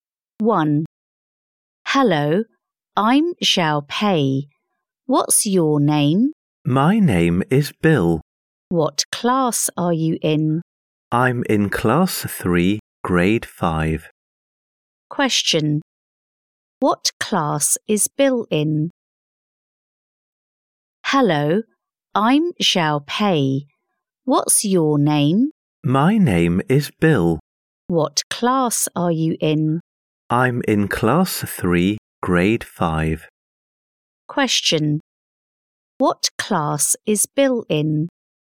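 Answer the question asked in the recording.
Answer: Class 3, Grade 5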